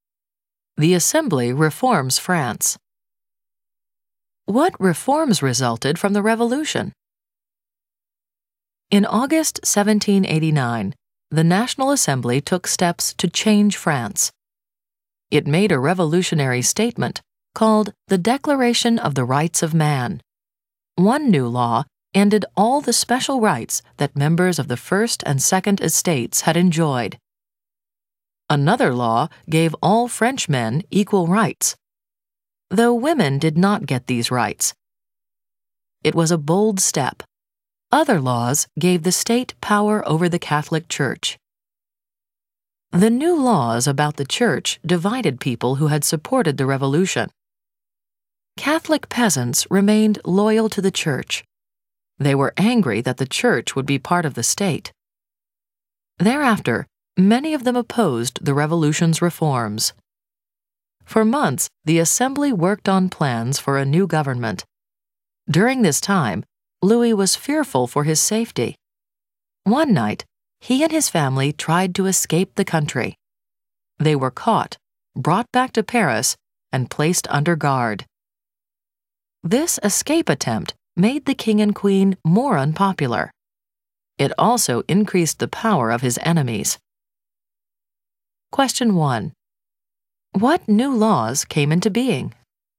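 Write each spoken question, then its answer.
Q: What new laws came into being?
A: Laws ending special rights of the First and Second Estates, giving all Frenchmen equal rights, and giving the state power over the Catholic Church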